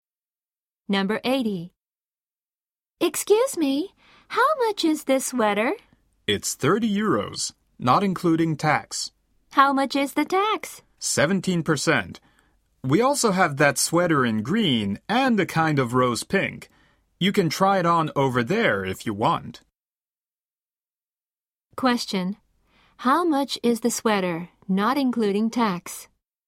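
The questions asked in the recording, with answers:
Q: How much is the sweater, not including tax?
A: 30 euros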